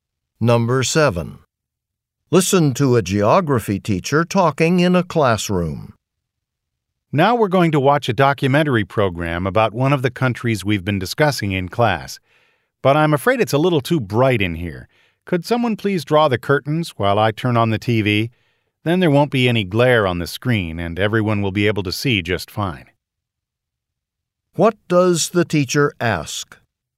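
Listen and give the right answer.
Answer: For someone to draw the curtains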